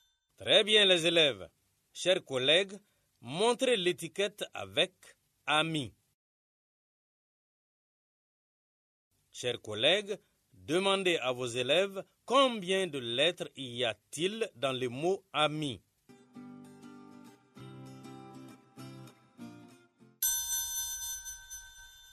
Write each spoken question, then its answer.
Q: Chers collègues, demandez à vos élèves combien de lettres y a-t-il dans le mot « ami ».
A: J'espère que les élèves ont trouvé 3 lettres.